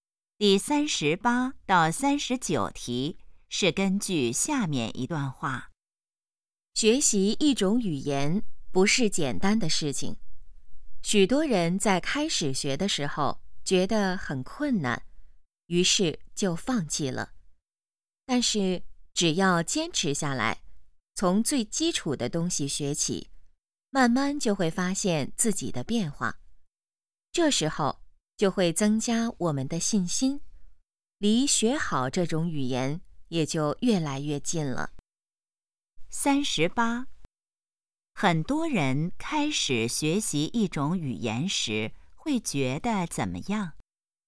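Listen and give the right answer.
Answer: 很困难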